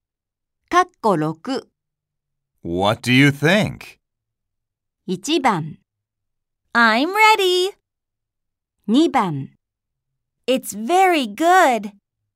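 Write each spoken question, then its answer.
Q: What do you think?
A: 2: It's very good.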